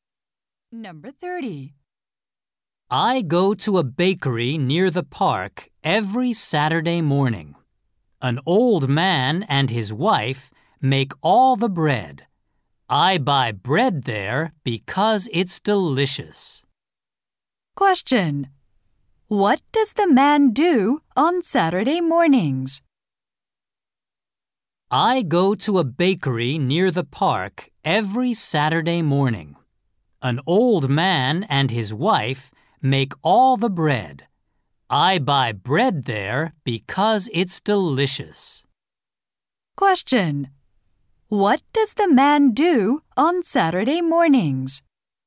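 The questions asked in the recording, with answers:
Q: What does the man do on Saturday mornings?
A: He goes to a bakery near the park to buy bread.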